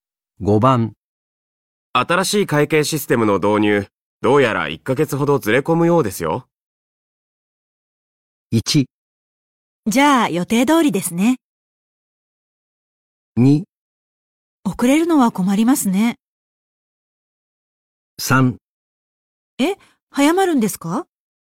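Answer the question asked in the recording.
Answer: 2: 遅れるのは困りますね。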